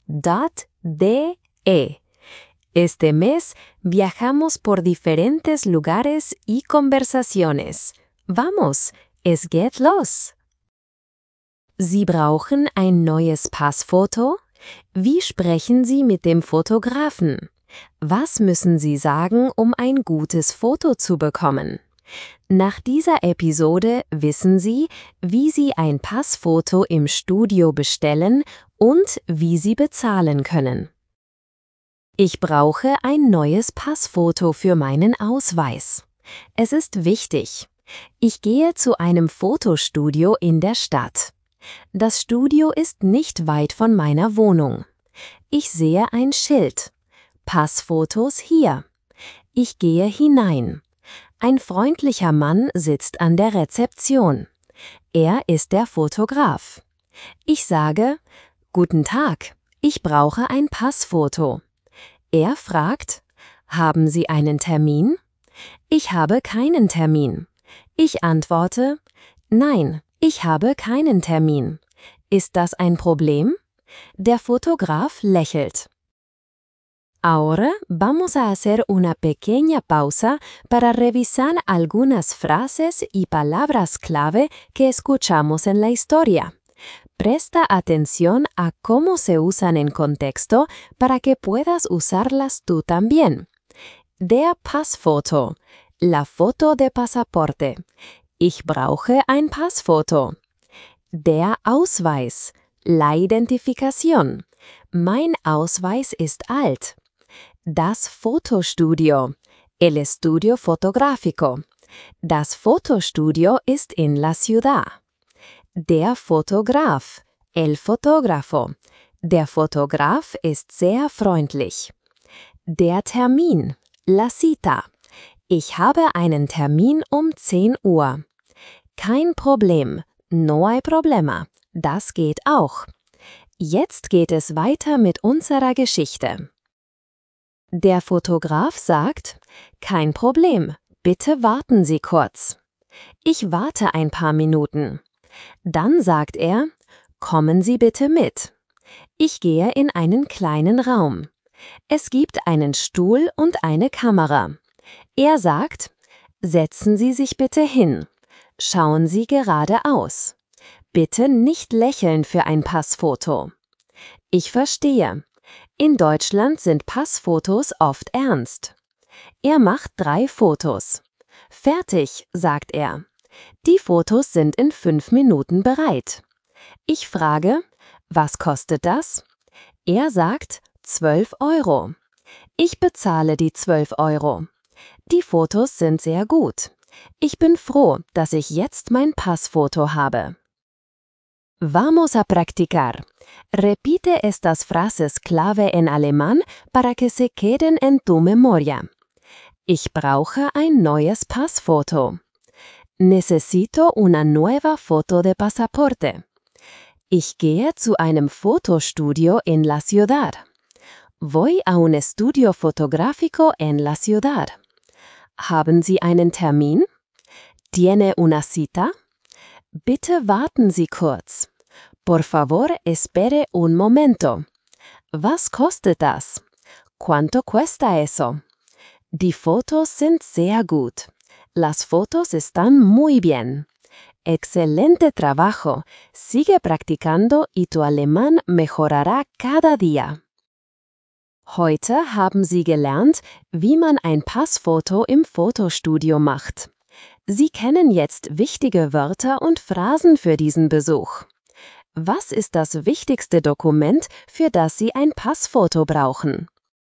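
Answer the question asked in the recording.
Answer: Der Ausweis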